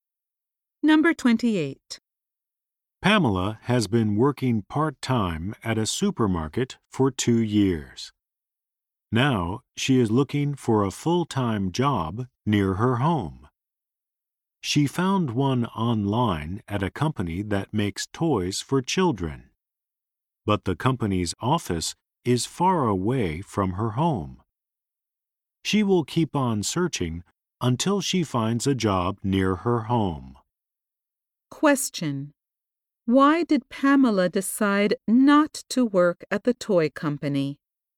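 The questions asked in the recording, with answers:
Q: why did Pamela decide not to work at the toy company?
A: Its office is far from her home.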